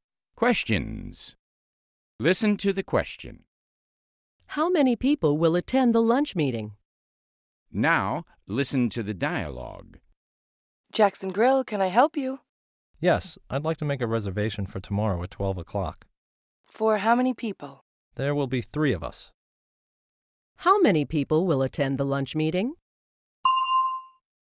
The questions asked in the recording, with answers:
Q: How many people will attend the lunch meeting?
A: There will be three people, Mr.